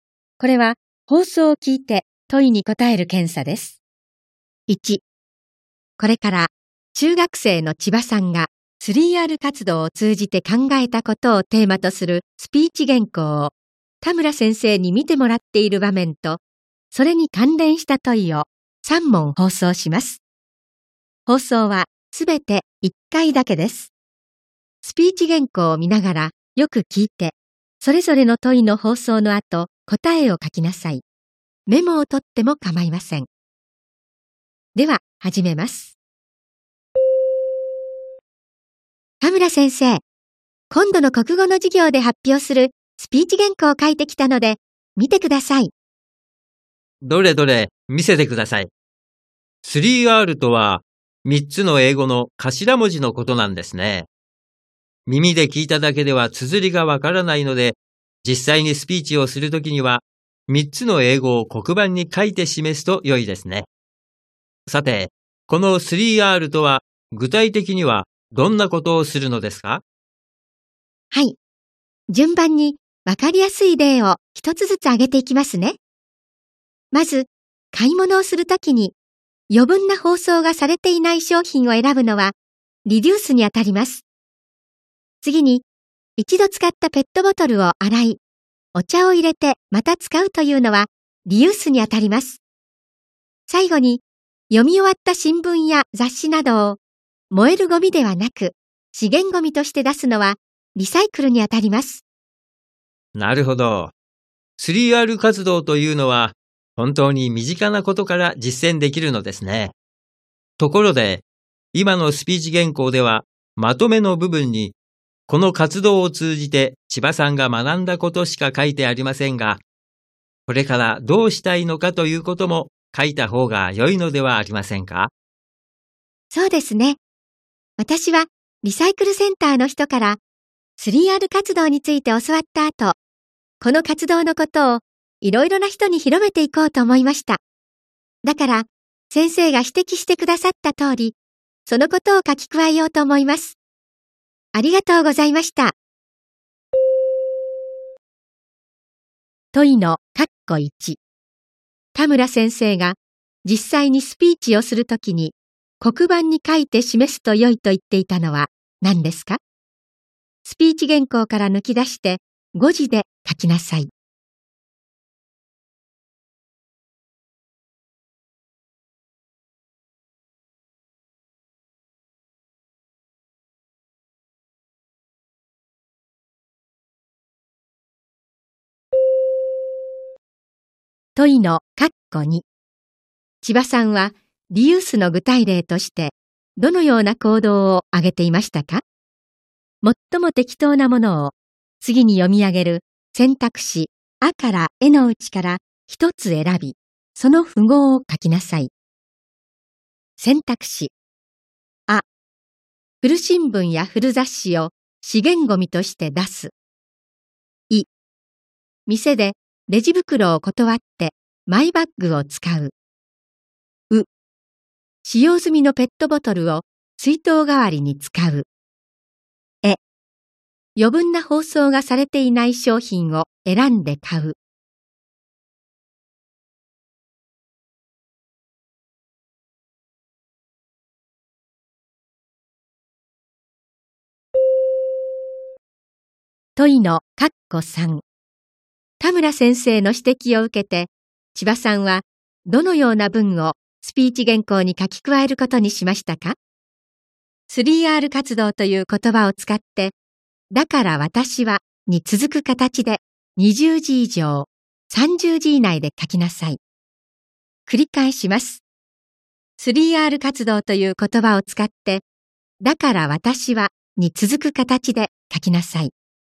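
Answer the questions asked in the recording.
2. ウ: 使用済みのペットボトルを水筒代わりに使う。
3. (だから私は)3R活動のことをいろいろな人に広めていこうと思います。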